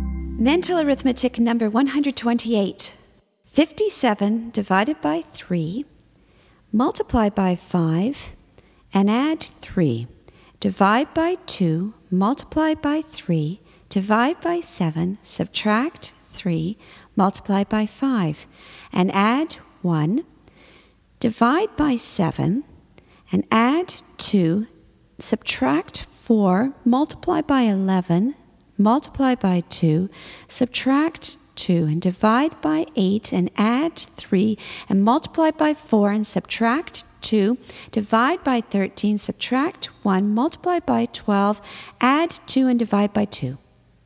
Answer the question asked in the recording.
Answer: And the answer is 55.